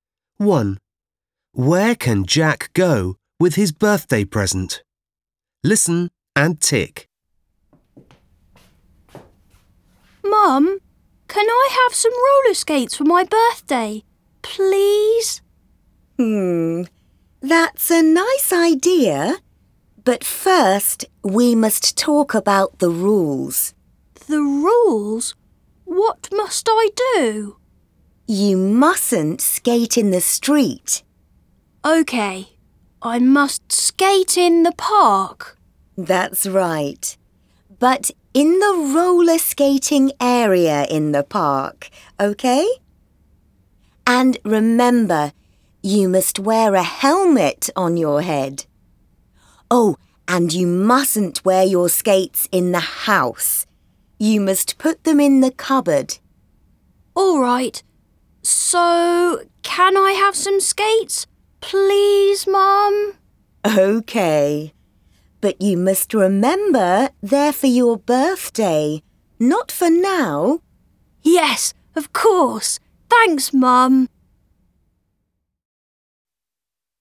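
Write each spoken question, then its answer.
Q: Where can Jack go with his birthday present?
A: To the roller skating area in the park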